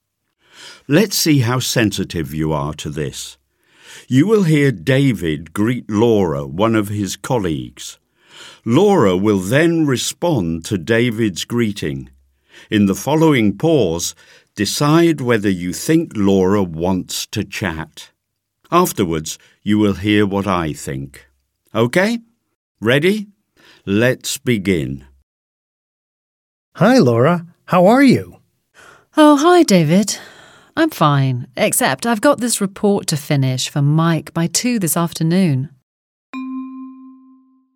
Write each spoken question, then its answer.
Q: In the following pause, decide whether you think Laura wants to chat.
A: Laura sounds a bit stressed.